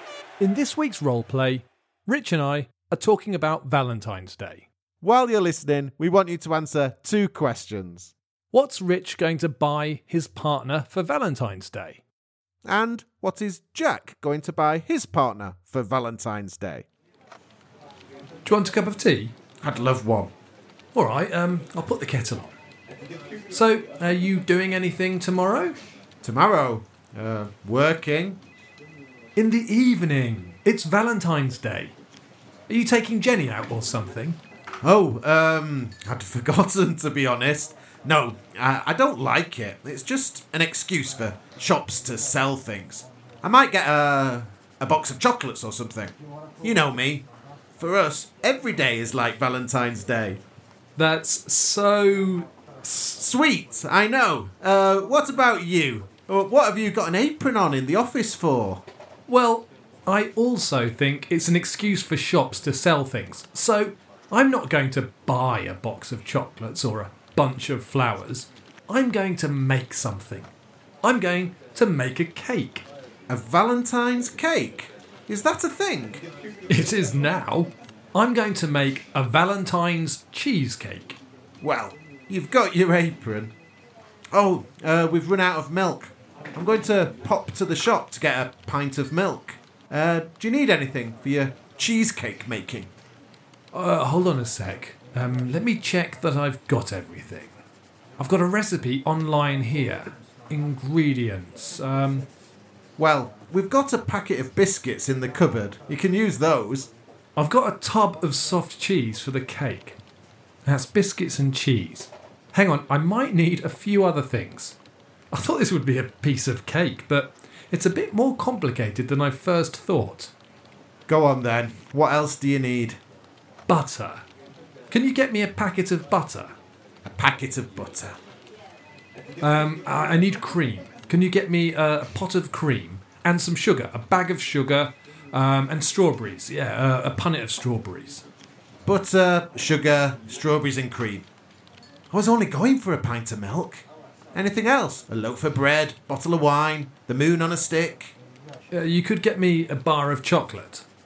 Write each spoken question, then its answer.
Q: And what is Jack going to buy his partner for Valentine's Day?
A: he's not going to buy anything, but he's going to make something.